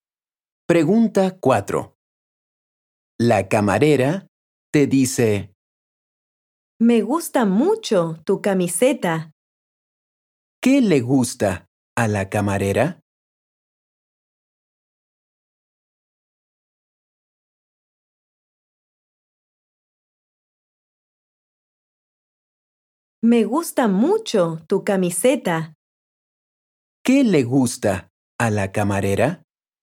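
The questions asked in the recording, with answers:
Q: ¿Qué le gusta a la camarera?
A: tu camiseta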